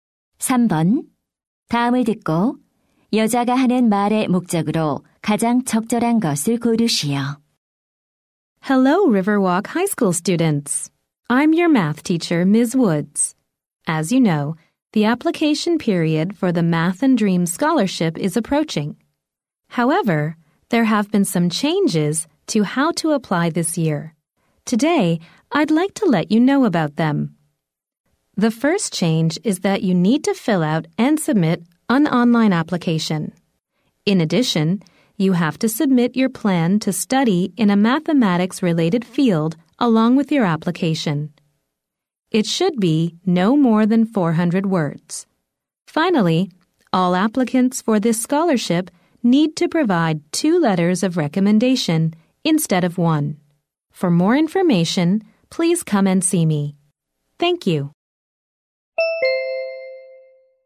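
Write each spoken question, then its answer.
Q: 다음을 듣고 여자가 하는 말의 목적으로 가장 적절한 것을 고르시오.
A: 장학금 신청 방법의 변경 사항을 안내하려고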